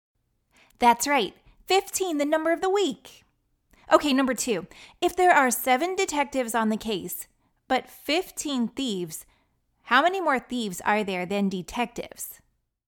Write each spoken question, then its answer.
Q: If there are 7 detectives on the case, but 15 thieves, how many more thieves are there than detectives?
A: 8. Because 7 plus 8 equals 15.